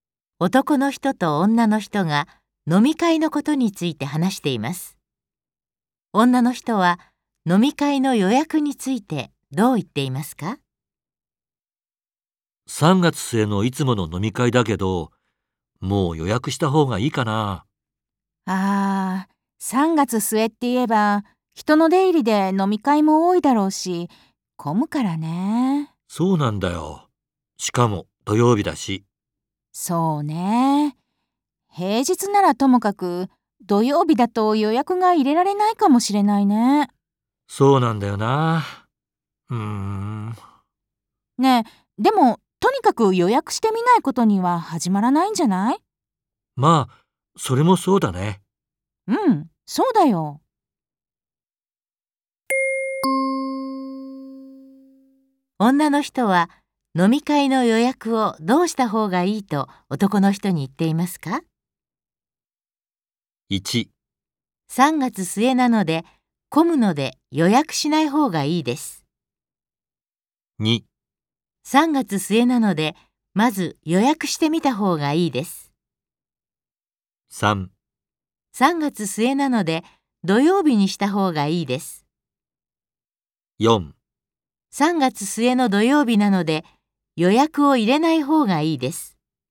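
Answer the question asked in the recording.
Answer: 2: 3月末なのでまず予約してみた方がいいです。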